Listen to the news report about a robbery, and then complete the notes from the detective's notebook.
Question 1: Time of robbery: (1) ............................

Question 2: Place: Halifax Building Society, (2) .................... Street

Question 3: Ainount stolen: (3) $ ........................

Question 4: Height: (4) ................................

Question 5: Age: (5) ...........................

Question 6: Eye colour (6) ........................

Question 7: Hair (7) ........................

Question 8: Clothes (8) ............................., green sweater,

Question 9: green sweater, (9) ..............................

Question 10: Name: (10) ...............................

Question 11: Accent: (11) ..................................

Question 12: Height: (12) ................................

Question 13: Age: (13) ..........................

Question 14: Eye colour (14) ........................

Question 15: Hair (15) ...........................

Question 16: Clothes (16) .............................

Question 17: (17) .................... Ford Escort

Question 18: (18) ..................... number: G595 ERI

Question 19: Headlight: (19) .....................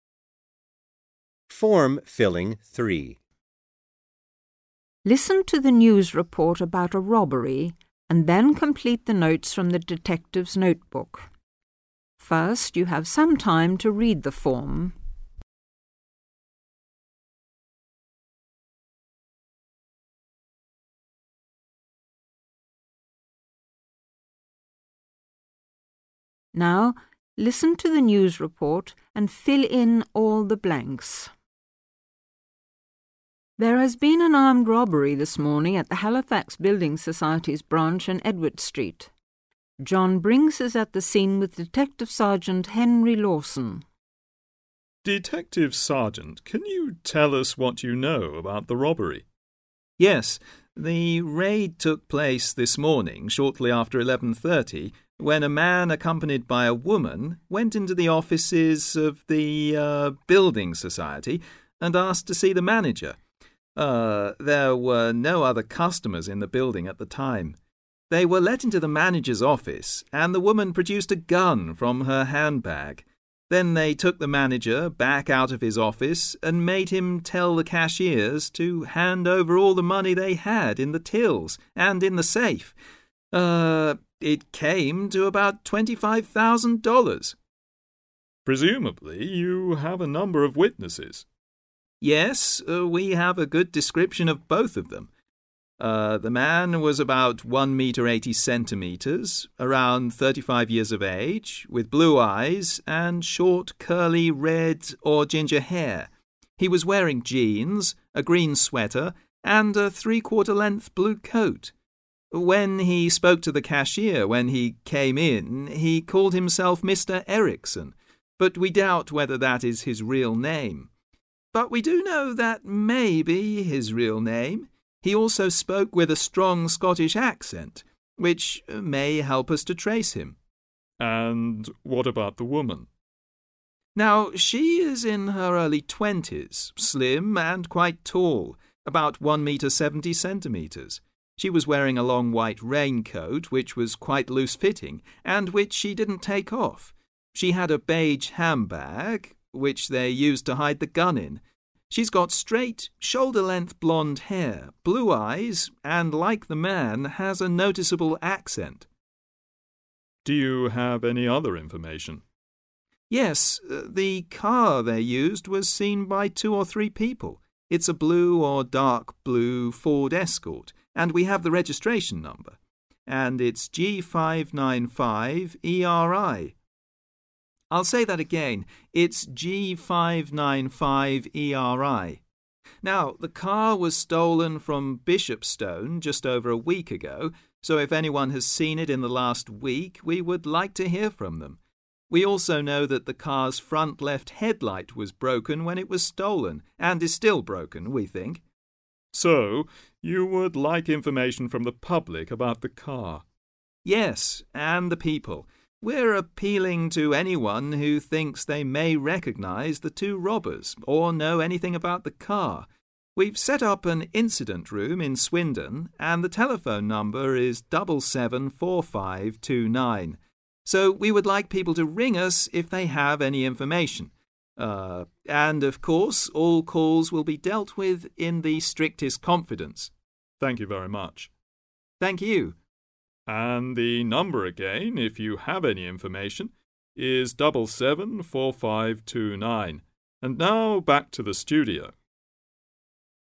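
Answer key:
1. shortly after 11:30
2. Edward
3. 25,000
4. 1 metre 80 centimetres
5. around 35
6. blue
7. short, curly red or ginger
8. jeans
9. a three-quarter length blue coat
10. Erickson
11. Scottish
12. 170cm
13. early twenties
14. blue
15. straight, shoulder-length blonde
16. long white raincoat
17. blue or dark blue
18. registration
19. front left broken

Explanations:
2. - Chỗ trống cần điền là tên để tạo thành tên đường - Phút 0:33 cô này có nói"There has been an armed robbery this morning at the Halifax Building Society's branch in Edward Street" (Dịch: Đã xảy ra một vụ cướp có vũ trang sáng nay tại chi nhánh của Halifax Building Society trên đường Edward) - Như vậy đáp án là Edward
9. - Phút 1:45 anh này nói"He was wearing jeans, a green sweater and a three-quarter length blue coat" (dịch: Anh ấy mặc quần jeans, một chiếc áo len màu xanh lá cây và một chiếc áo khoác xanh lam dài ngang đùi) mình nghe thấy wear là mình biết đang nói về clothes cần chú ý lắng nghe - Đáp án: a three-quarter length blue coat
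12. - Phút 2:12 anh này hỏi về women như vậy cần chú ý lắng nghe"And what about the woman?" - Phút 2:17 anh này nói "tall" như vậy biết là chuẩn bị nói về chiều cao cần nghe kĩ nhé, "Now, she is in her early twenties, slim and quite tall, about one metre seventy centimetres" (Dịch: Bây giờ, cô ấy đang ở độ tuổi đầu hai mươi, dáng người mảnh mai và khá cao, khoảng một mét bảy mươi) - Như vậy đáp án: 170cm
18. - Phút 2:44 anh này có nhắc đến CAR như vậy cần lắng tai nghe kĩ vì sắp đến đoạn văn khoanh vùng rồi nhé - Phút 2:51 anh này nói"It's a blue or dark blue Ford Escort and we have the registration number and it's G595 ERI" —> như vậy đáp án là registration (tức là the registration number = số đăng kí biển số)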